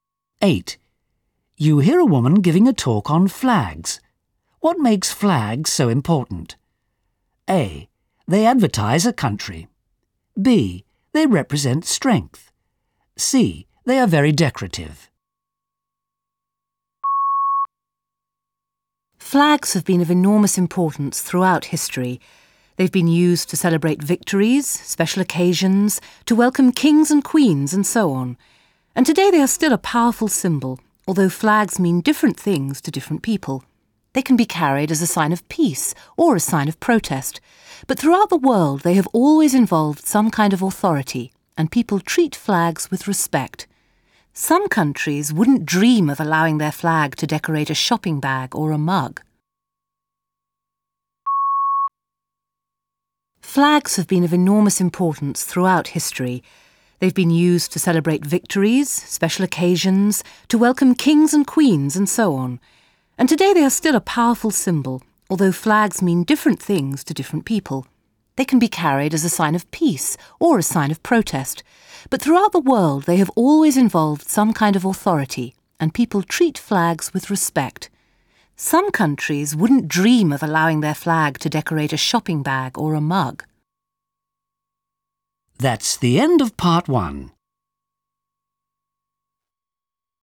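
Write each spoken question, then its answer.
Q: What makes flags so important?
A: B: They represent strength.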